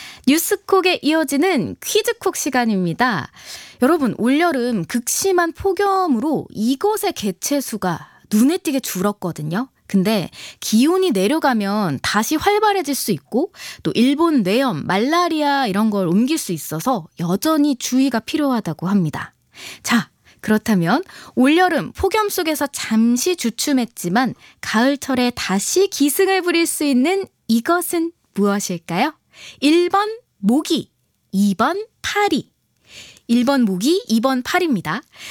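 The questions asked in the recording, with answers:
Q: 자, 그렇다면 올여름 폭염 속에서 잠시 주춤했지만 가을철에 다시 기승을 부릴 수 있는 이것은 무엇일까요?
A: 1번: 모기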